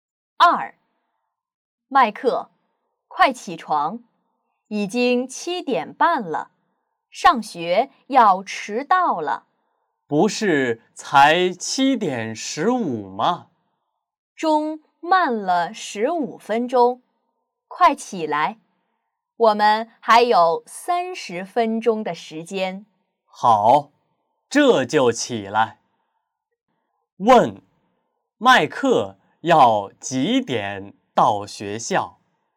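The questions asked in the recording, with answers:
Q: 问,麦克要几点到学校?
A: 8:00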